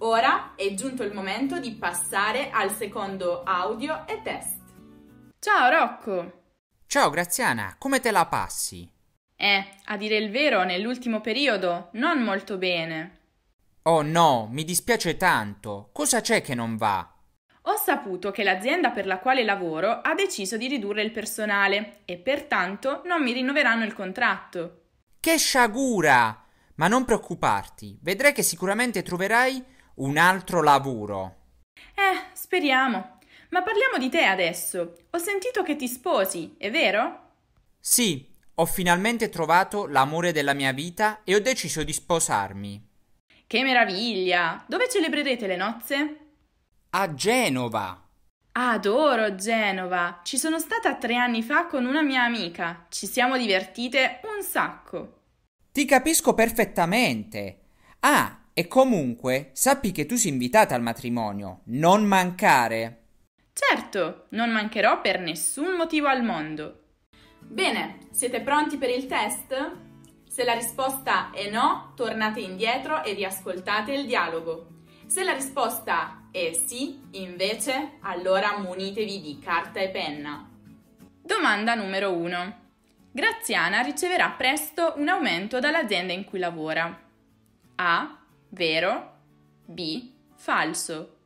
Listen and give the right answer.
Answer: La risposta corretta è B.